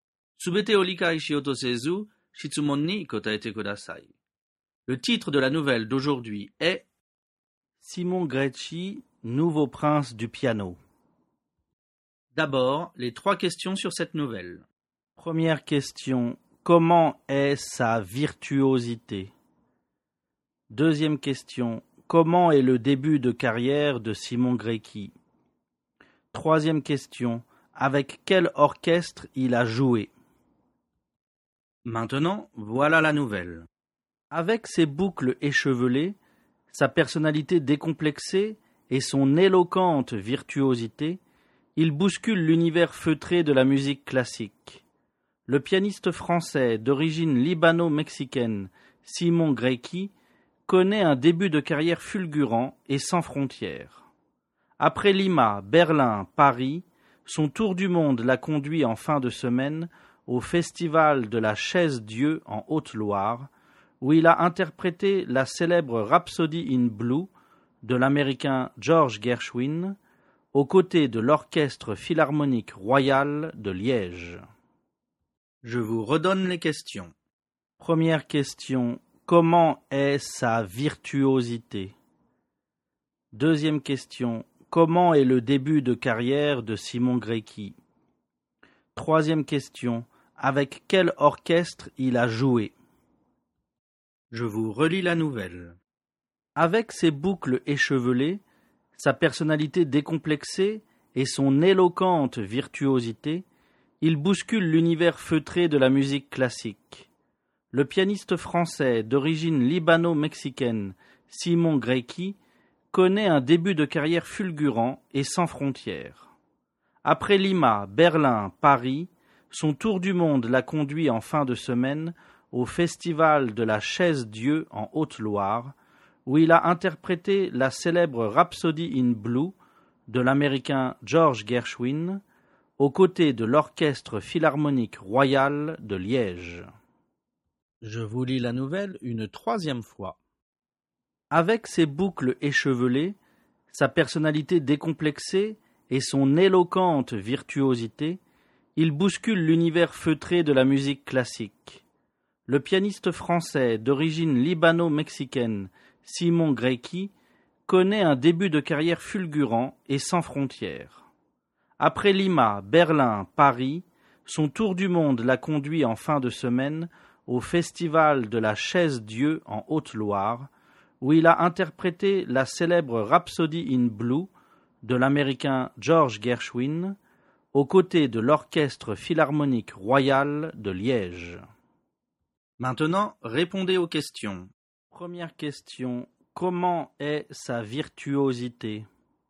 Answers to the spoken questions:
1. Réponse, sa virtuosité est éloquente.
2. Réponse, son début de carrière est fulgurant et sans frontières.
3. Réponse, il a joué avec l'Orchestre Philharmonique Royal de Liège.